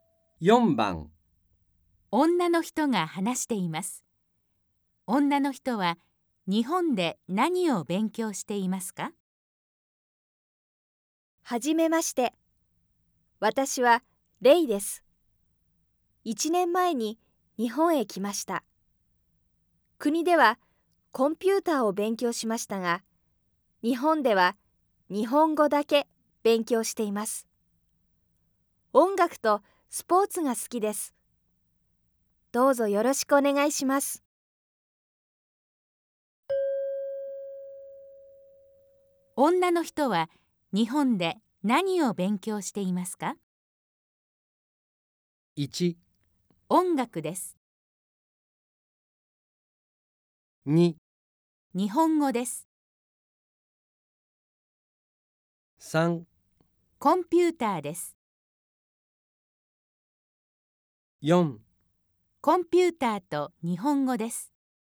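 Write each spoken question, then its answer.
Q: 女の人は日本で何を勉強していますか?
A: 2: 日本語です。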